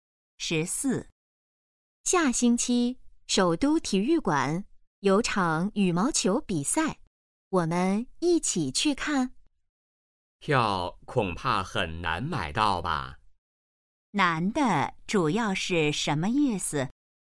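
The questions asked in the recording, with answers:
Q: 难的主要是什么意思?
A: 票很难买到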